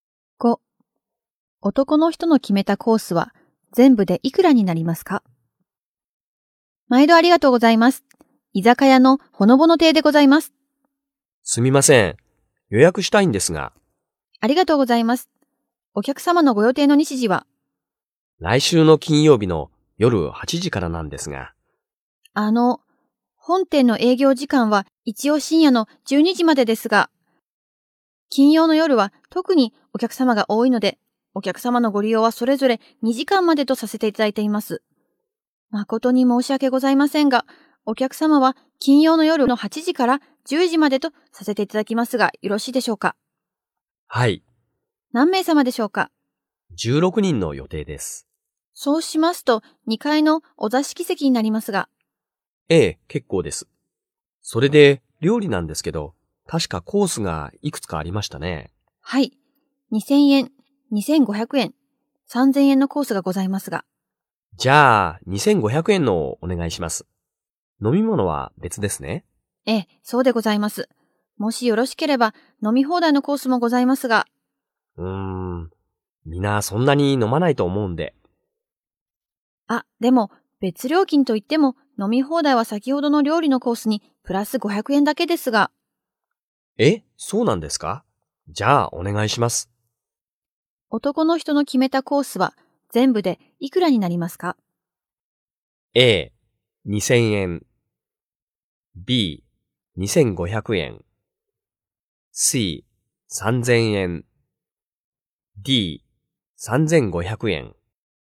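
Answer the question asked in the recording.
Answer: C: 3000円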